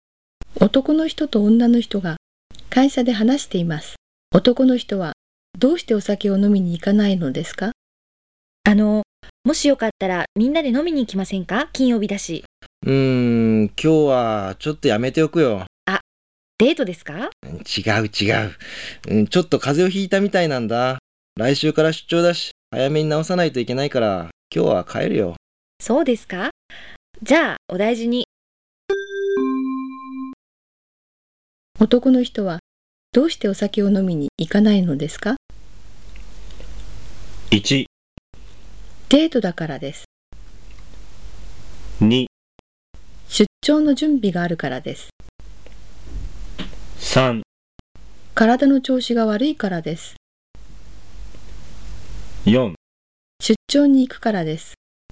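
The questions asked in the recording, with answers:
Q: 男の人はどうしてお酒を飲みに行かないのですか?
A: 3: 体の調子が悪いからです。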